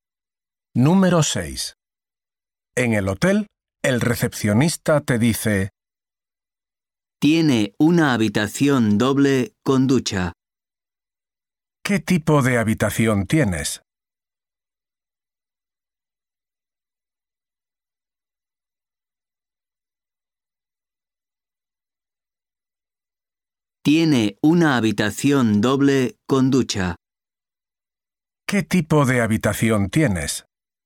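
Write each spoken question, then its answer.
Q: ¿Qué tipo de habitación tienes?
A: Una habitación doble con ducha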